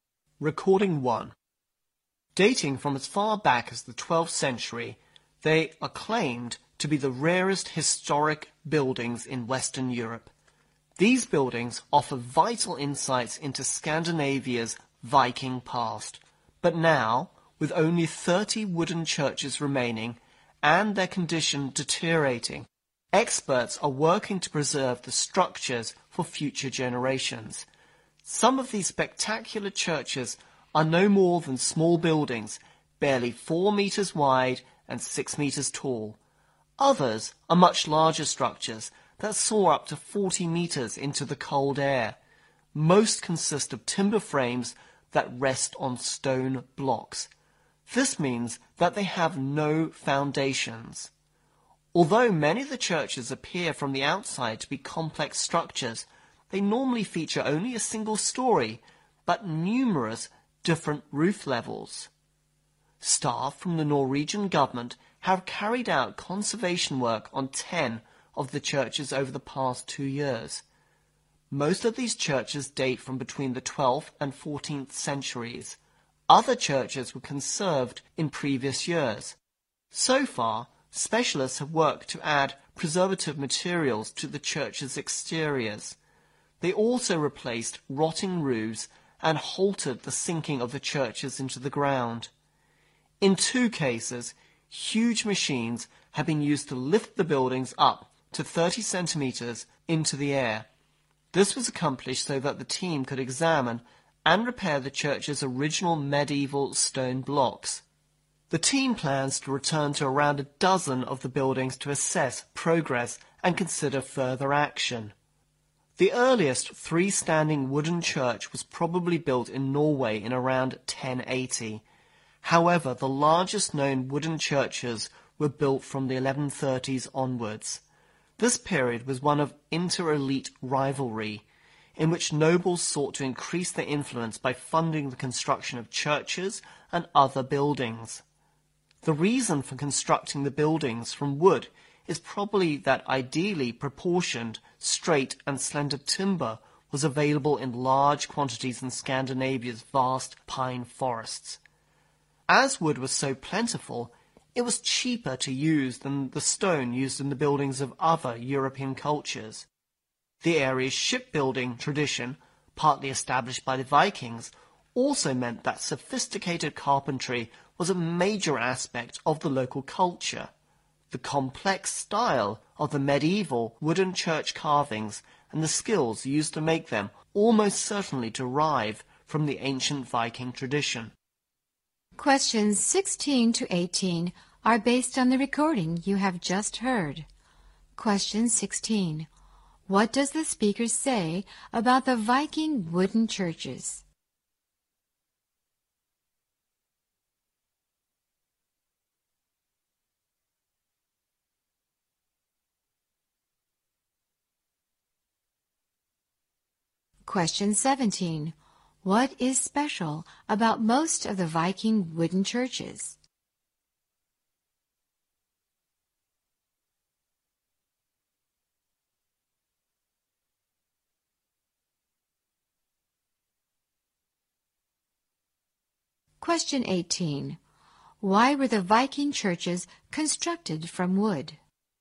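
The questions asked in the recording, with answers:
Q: What does the speaker say about the Viking wooden churches?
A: They are the rarest historic buildings in Western Europe, and only 30 remain, deteriorating

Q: What is special about most of the Viking wooden churches?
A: They have no foundations; timber frames rest on stone blocks

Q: Why were the Viking churches constructed from wood?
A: Suitable timber was plentiful and cheaper than stone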